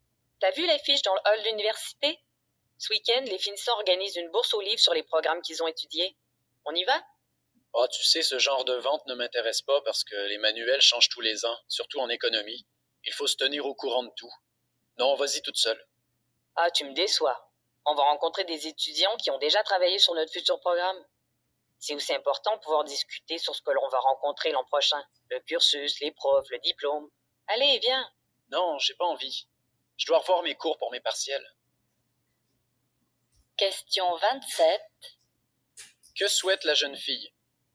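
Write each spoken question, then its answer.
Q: Que souhaite la jeune fille?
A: Aller avec son ami à la bourse aux livres organisée par les finissants, pour rencontrer des étudiants plus avancés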